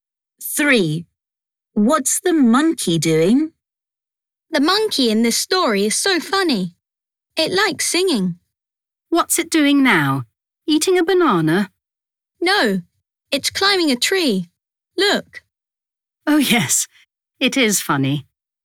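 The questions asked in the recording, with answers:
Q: What's the monkey doing?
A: climbing a tree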